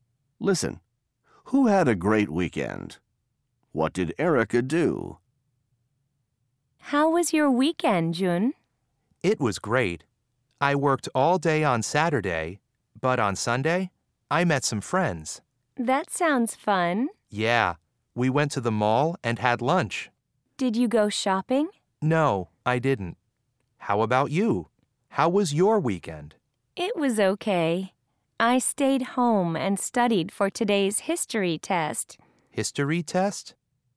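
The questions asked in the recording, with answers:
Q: Who had a great weekend?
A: Jun

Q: What did Erica do?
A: She stayed home and studied for a history test.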